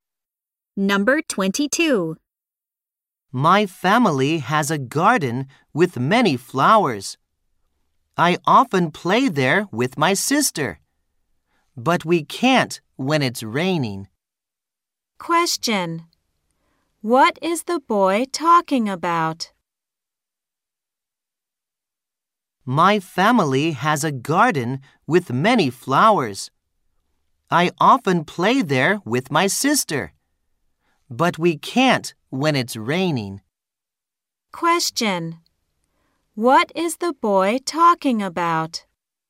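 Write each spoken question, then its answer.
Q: What is the boy talking about?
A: His family's garden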